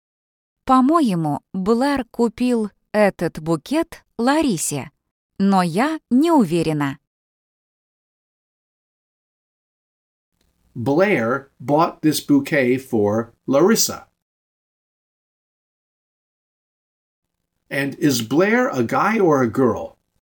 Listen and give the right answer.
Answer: He's a guy.